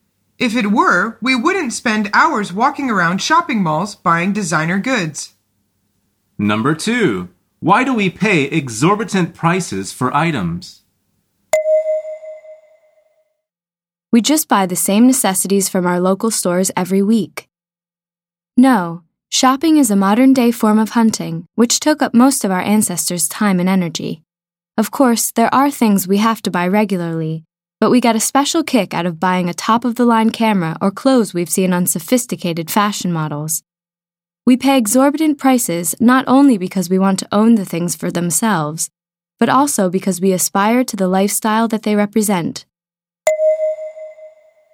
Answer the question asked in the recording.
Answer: The answer is because we aspire to the lifestyle that they represent.